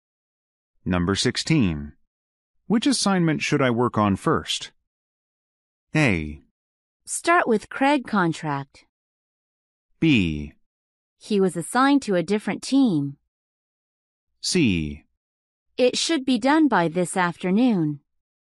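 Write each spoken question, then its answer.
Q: Which assignment should I work on first?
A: A: Start with Craig contract.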